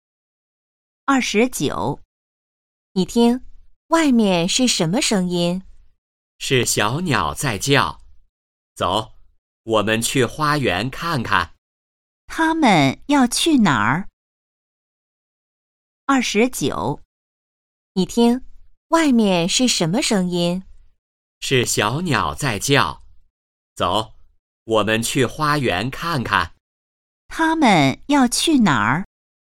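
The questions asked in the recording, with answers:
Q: 他们要去哪儿?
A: 花园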